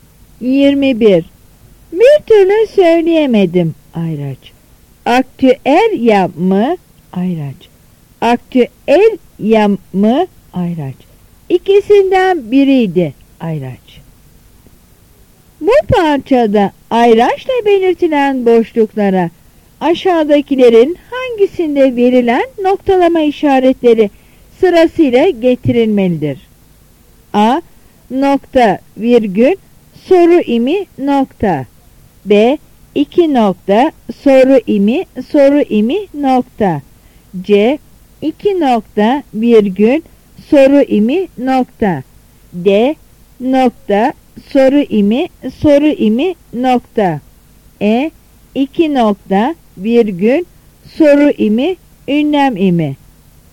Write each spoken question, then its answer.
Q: Bu parçada ayraçla belirtilen boşluklara aşağıdakilerin hangisinde verilen noktalama işaretleri sırasıyla getirilmelidir?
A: Yanıt C.